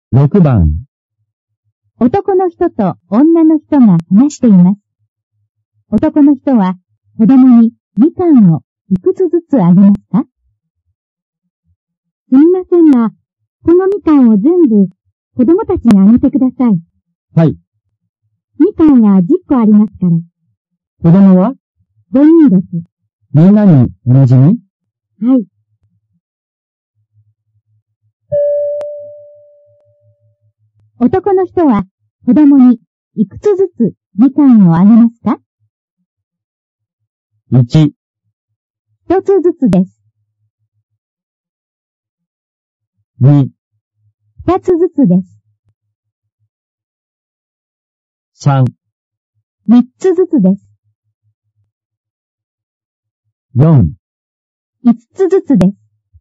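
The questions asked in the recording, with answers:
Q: 男の人は子供にいくつずつみかんをあげますか?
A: 2: 二つずつです。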